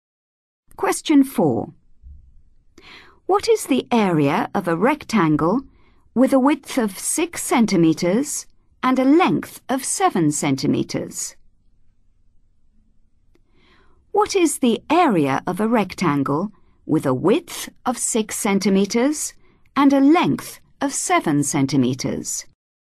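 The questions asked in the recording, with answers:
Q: What is the area of a rectangle with a width of 6 centimeters and a length of 7 centimeters?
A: 42 cm2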